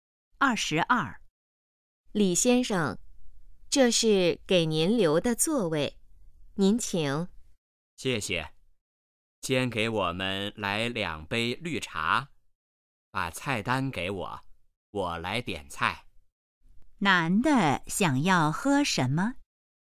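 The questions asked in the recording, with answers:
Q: 男的想要喝什么?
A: 绿茶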